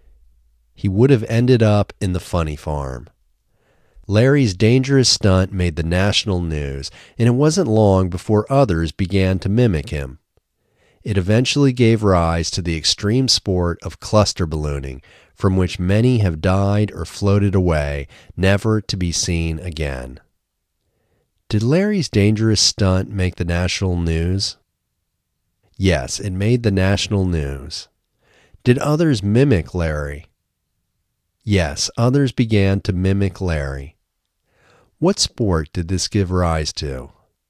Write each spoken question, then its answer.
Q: What sport did this give rise to?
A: It gave rise to the extreme sport of cluster ballooning.